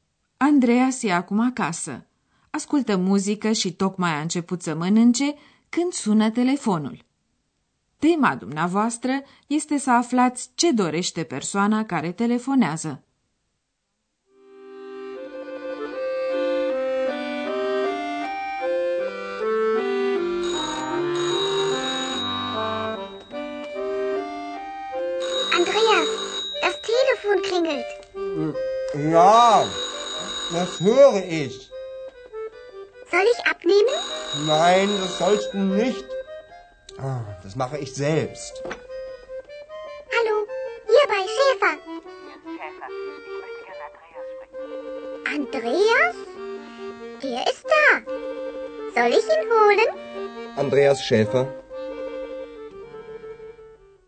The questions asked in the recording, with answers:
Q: Tema dumneavoastră este să aflați ce dorește persoana care telefonează.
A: Femeia care telefonează vrea să vorbească cu Andreas.